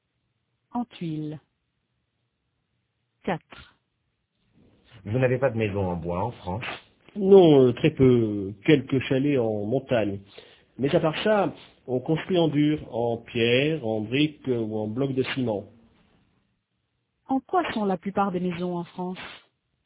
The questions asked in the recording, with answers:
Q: En quoi sont la plupart des maisons en France ?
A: En dur, en pierre, en briques ou en blocs de ciment.